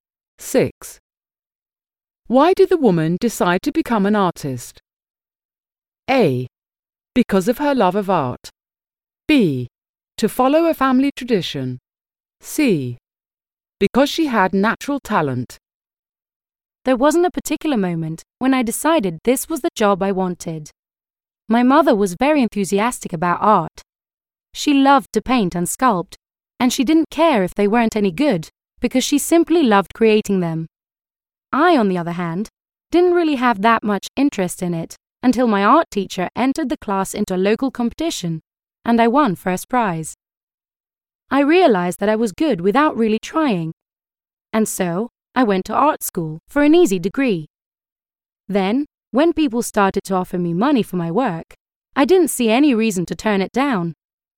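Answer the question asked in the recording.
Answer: C: Because she had natural talent.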